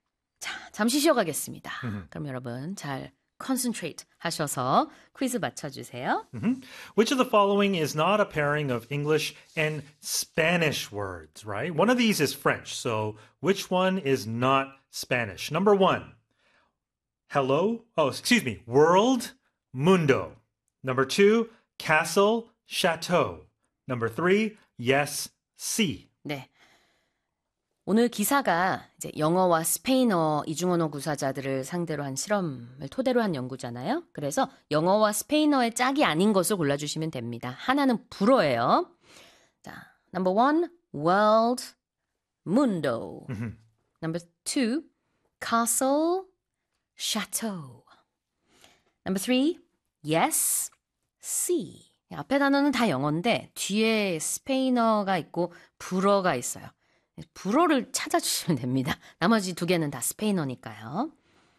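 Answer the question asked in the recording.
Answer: 2: castle, chateau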